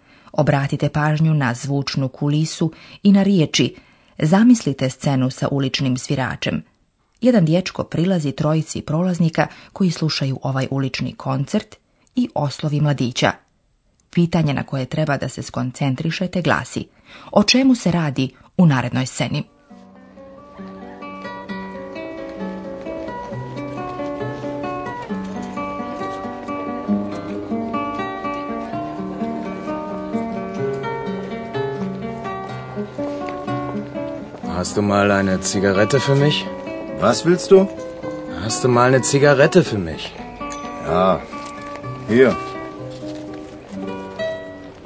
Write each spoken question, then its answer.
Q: o čemu se radi u narednoj sceni?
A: Radi se dakle o momku koji traži od mladića cigaretu.